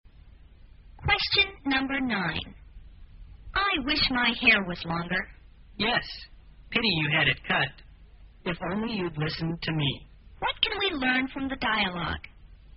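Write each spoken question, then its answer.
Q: What can we learn from the dialogue?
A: She regrets having her hair cut; the other person had advised her not to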